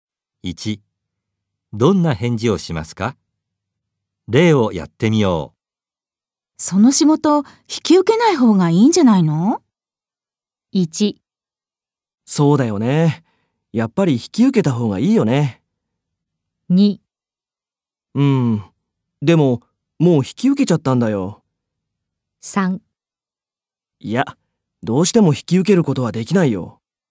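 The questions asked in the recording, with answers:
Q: その仕事、引き受けない方がいいんじゃないの?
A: 2: でも、もう引き受けちゃったんだよ。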